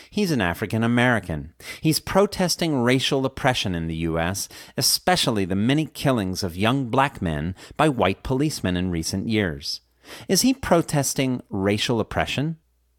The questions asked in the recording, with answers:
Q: Is he protesting racial oppression?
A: Yes, he's protesting racial oppression.